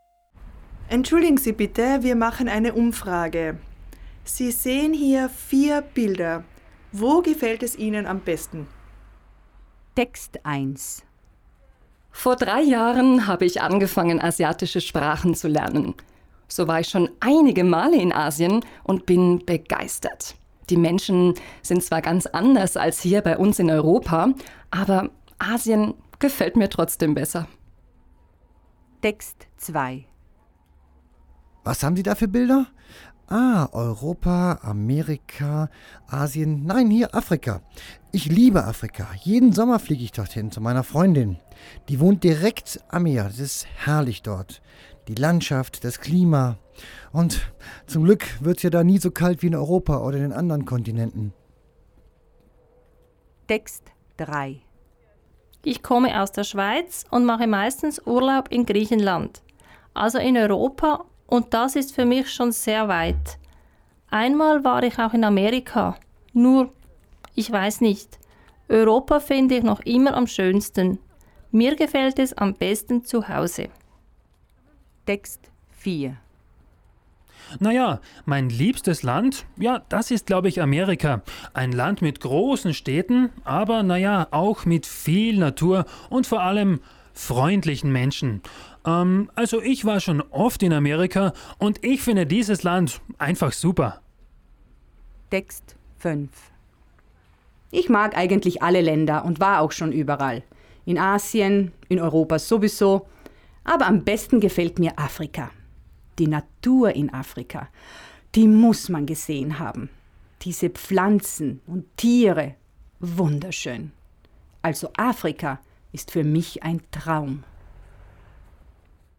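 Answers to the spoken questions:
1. Asien
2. Afrika
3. Europa
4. Amerika
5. Afrika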